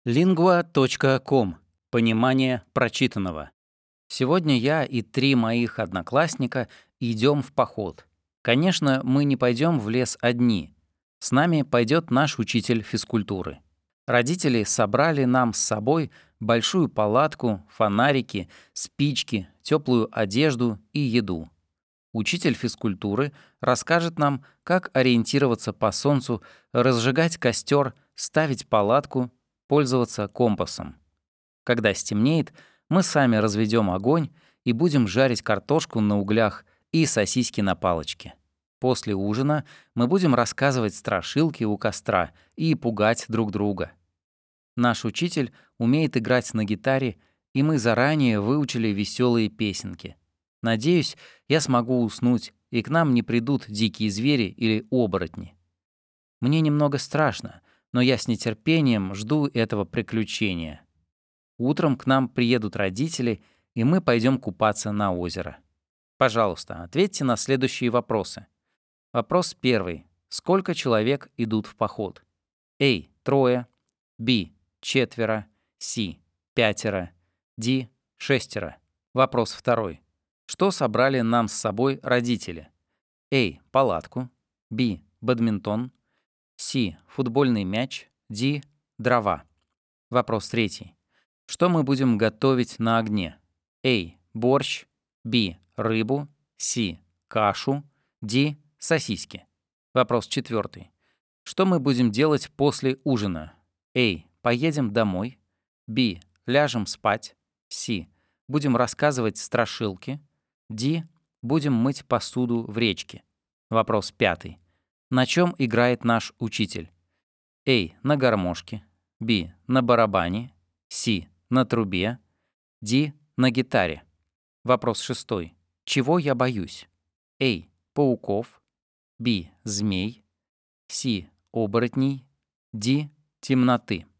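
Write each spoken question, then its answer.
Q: Что собрали нам с собой родители?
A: A: Палатку.

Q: Что мы будем готовить на огне?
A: D: Сосиски.

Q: Что мы будем делать после ужина?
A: C: Будем рассказывать страшилки.

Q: На чем играет наш учитель?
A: D: На гитаре.

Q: Чего я боюсь?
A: C: Оборотней.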